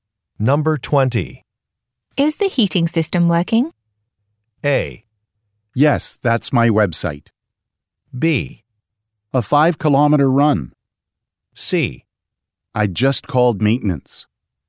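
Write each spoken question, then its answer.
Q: Is the heating system working?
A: C: I just called maintenance.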